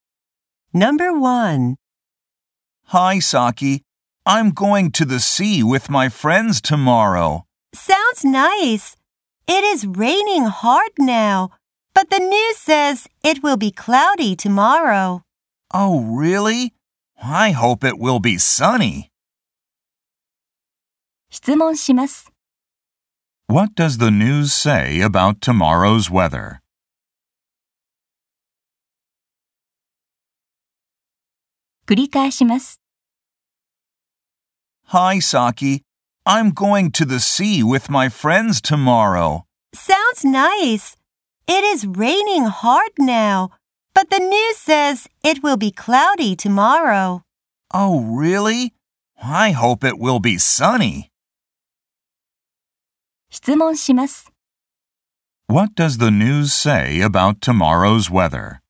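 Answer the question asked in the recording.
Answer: It will be cloudy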